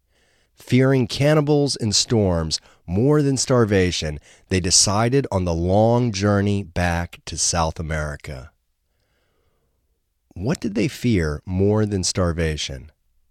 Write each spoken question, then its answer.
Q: What did they fear more than starvation?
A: They feared cannibals and storms more than starvation.